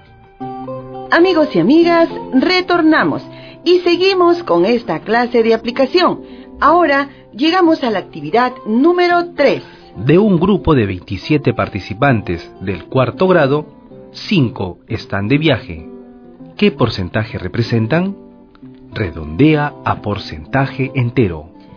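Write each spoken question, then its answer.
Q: ¿Qué porcentaje representan?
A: 19%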